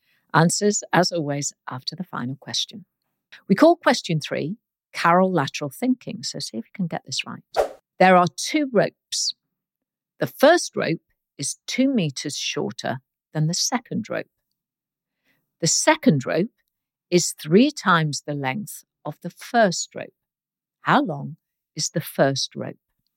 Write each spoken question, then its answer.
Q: How long is the first rope?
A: And the answer is the first rope is 1 meter long.